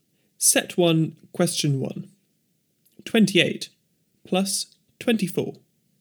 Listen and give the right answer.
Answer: Answer 52.